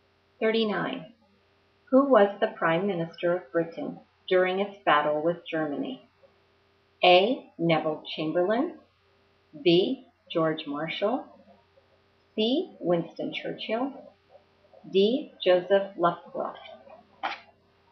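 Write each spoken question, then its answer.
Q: Who was the Prime Minister of Britain during its battle with Germany?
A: C: Winston Churchill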